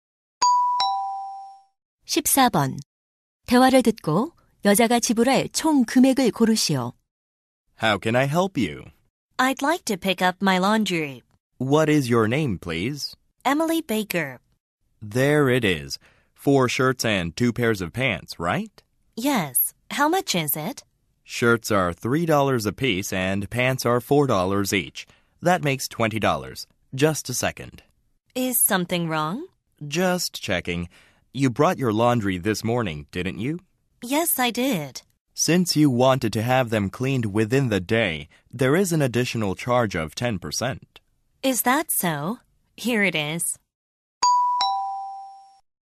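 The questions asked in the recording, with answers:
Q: 대화를 듣고 여자가 지불할 총 금액을 고르시오.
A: $22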